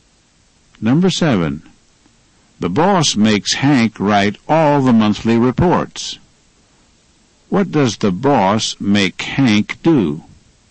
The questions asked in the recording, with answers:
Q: What does the boss make Hank do?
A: He makes him write all the monthly reports.